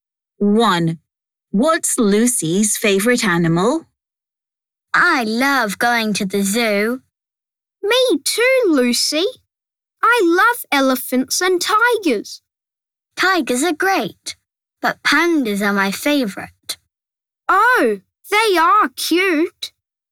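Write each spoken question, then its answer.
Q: What's Lucy's favourite animal?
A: pandas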